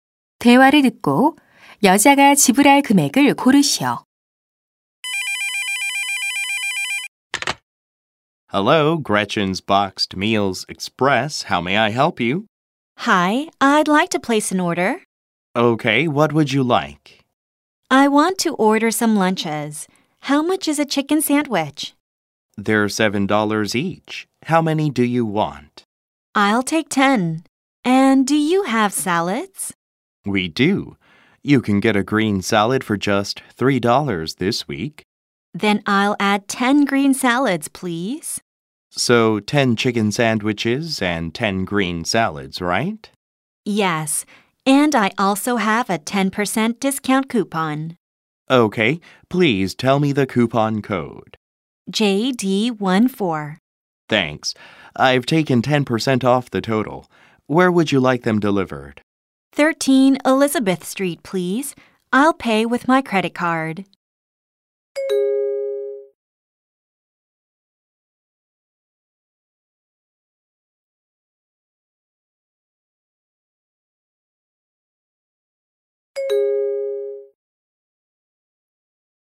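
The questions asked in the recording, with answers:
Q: 대화를 듣고 여자가 지불할 금액을 고르시오.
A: 90달러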